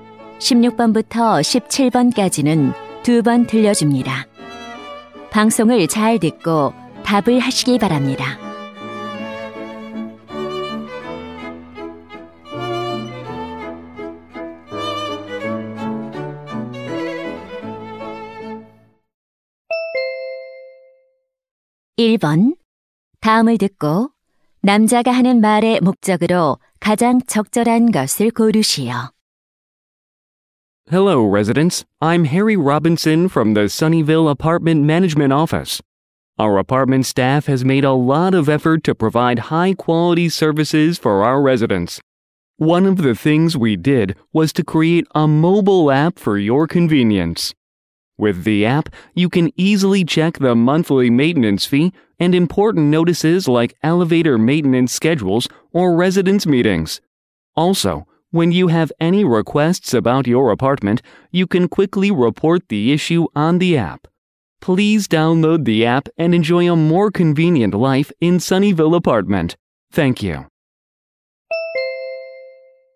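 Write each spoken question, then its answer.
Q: 다음을 듣고 남자가 하는 말의 목적으로 가장 적절한 것을 고르시오.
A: 아파트 모바일 앱 이용을 홍보하려고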